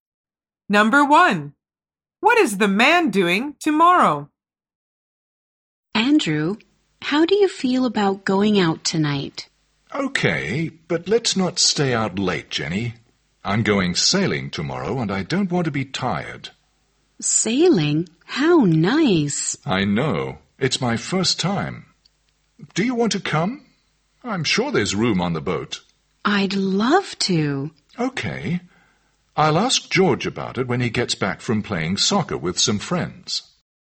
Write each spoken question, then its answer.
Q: what is the man doing tomorrow?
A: The answer is, he's going sailing.